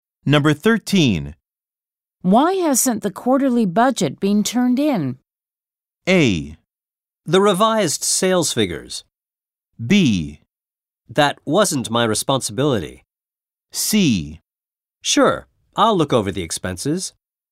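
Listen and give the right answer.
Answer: B: That wasn't my responsibility.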